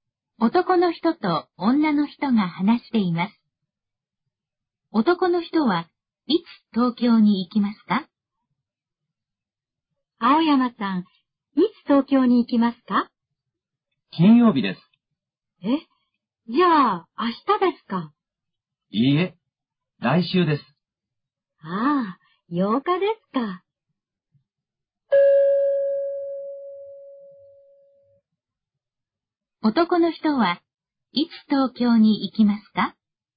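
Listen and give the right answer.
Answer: 来週の金曜日(8日)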